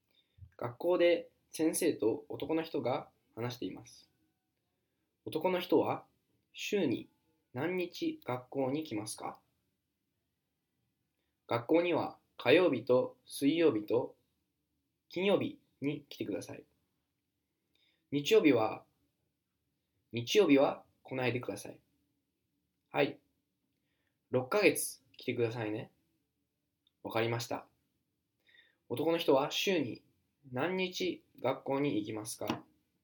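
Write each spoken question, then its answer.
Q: 男の人は週に何日学校に行きますか?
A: 3日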